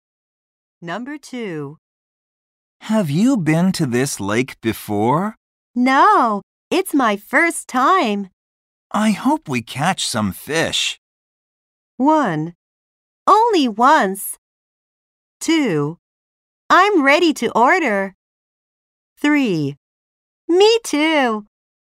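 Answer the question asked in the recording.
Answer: 3: Me too.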